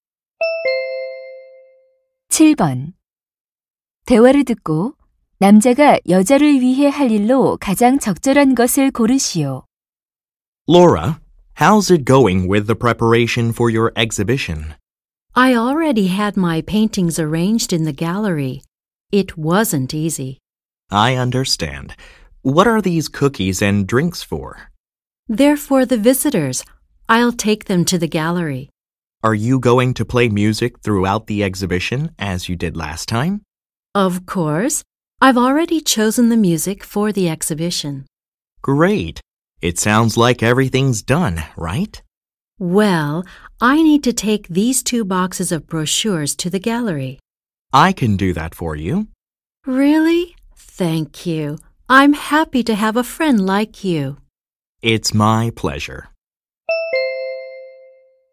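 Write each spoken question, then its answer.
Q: 대화를 듣고 남자가 여자를 위해 할 일로 가장 적절한 것을 고르시오.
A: 안내 책자 두 상자를 갤러리로 옮기기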